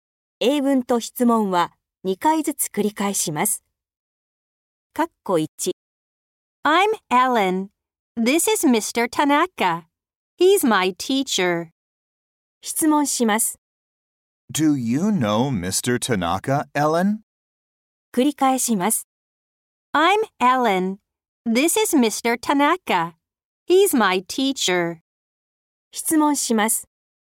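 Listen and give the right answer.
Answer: Yes, I do.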